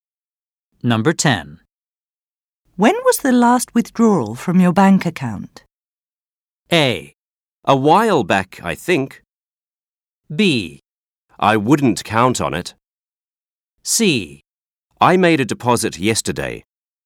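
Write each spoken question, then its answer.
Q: When was the last withdrawal from your bank account?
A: A: A while back, I think.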